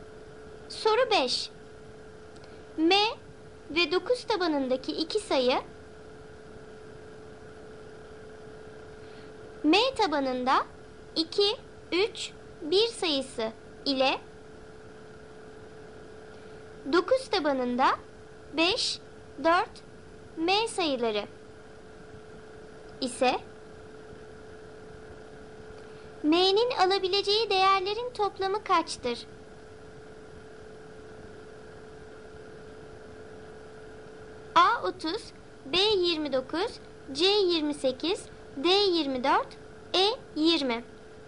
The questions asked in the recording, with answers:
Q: M'nin alabileceği değerlerin toplamı kaçtır?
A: Doğru cevap A 30.